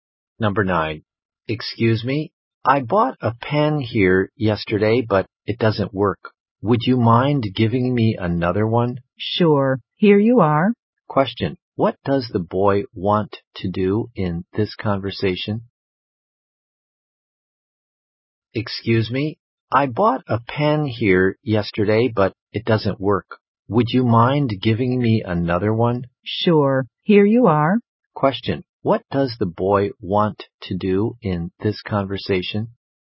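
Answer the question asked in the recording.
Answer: Exchange the pen for another one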